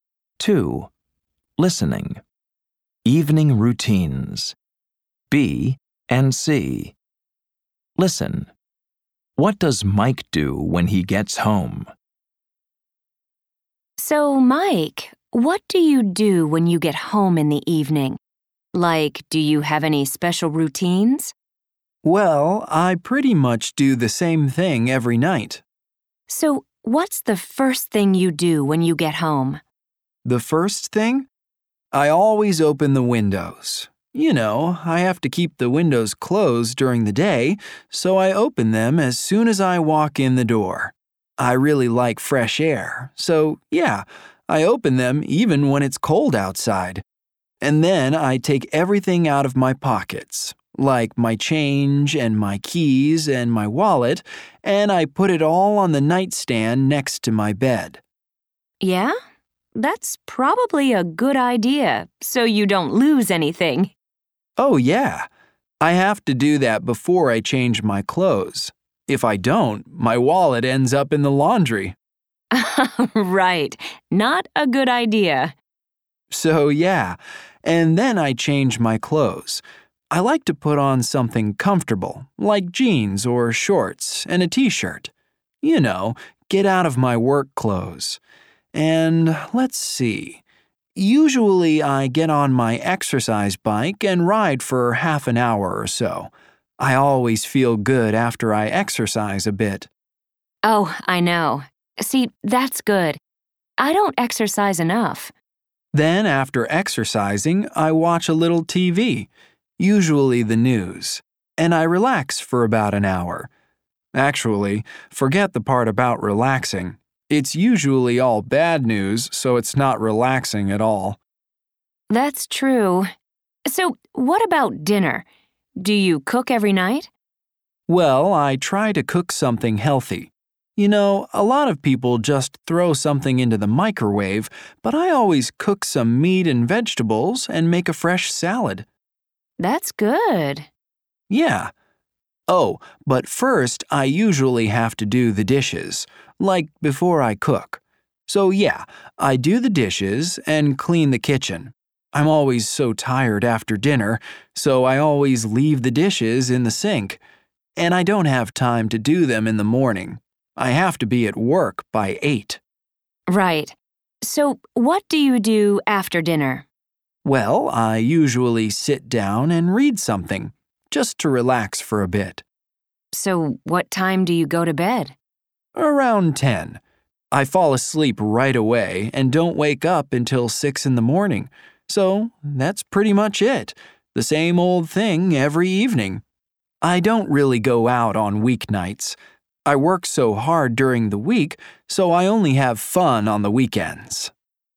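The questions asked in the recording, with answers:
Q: What does Mike do when he gets home?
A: He opens the windows, empties his pockets, changes clothes, rides his exercise bike, watches TV, does the dishes, cooks dinner, reads, and goes to bed around 10.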